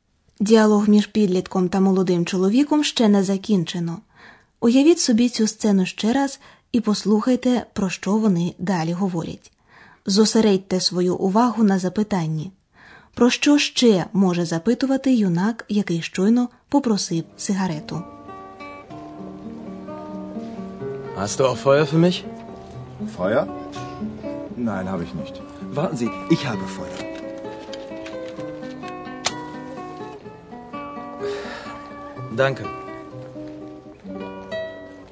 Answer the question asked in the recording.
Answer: Щоб запалити сигарету, потрібен вогонь.